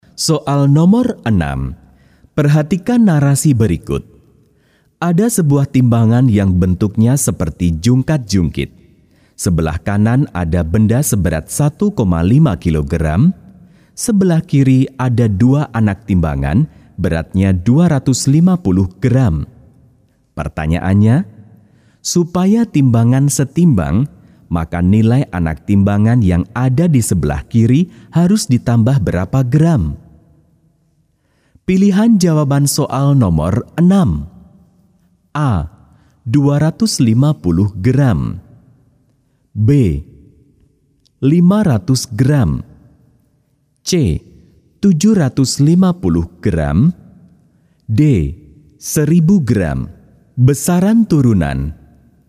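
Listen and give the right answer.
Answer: D: 1000 gram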